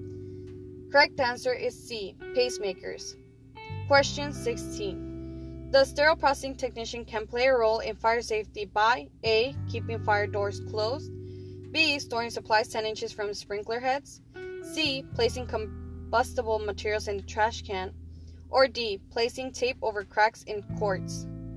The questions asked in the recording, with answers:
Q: The sterile processing technician can play a role in fire safety by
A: Correct answer is A, keeping fire doors closed.